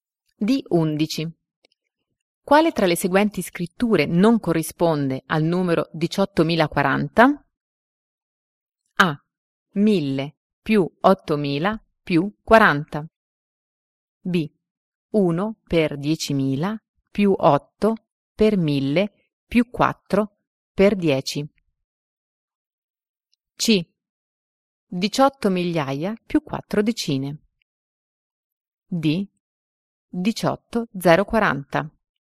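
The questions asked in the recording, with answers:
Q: Quale tra le seguenti scritture non corrisponde al numero 18.040?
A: A: 1000 più 8.000 più 40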